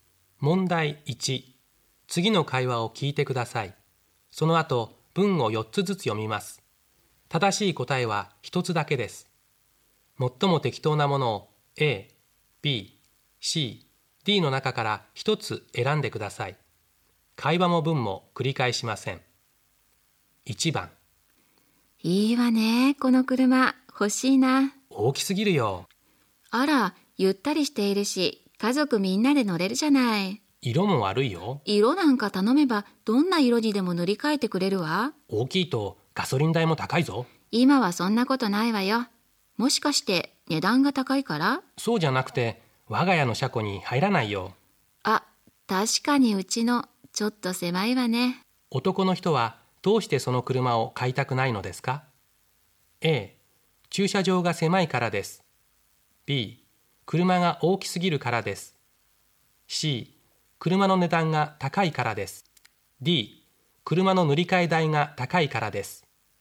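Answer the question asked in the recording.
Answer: A: 駐車場が狭いからです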